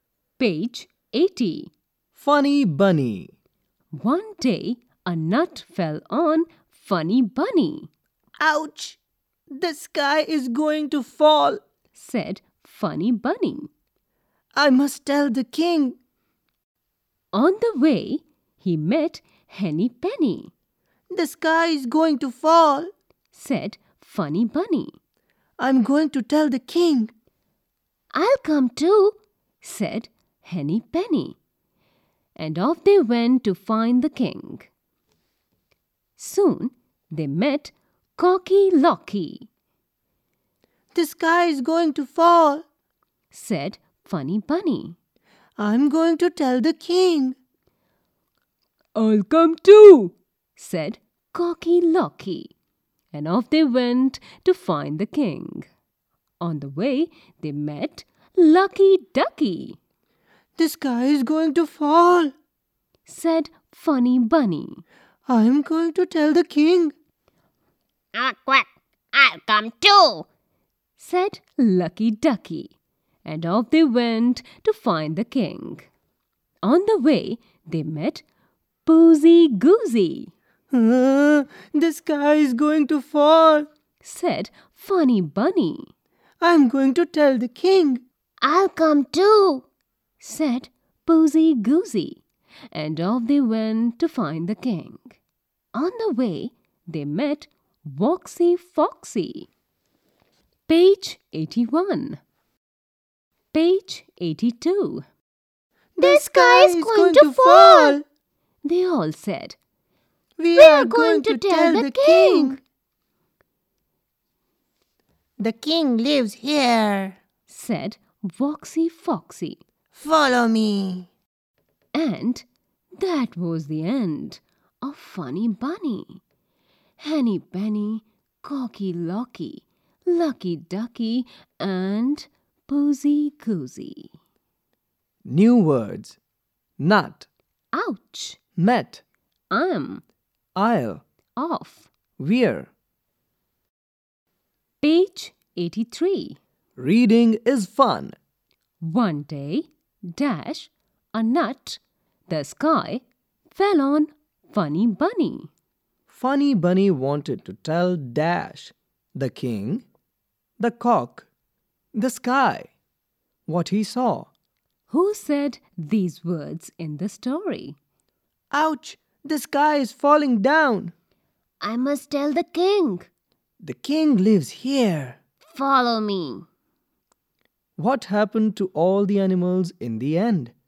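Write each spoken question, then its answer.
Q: Who said these words in the story?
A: "Ouch! The sky is falling down. I must tell the king.": Funny Bunny; "The king lives here. Follow me.": Woxy Foxy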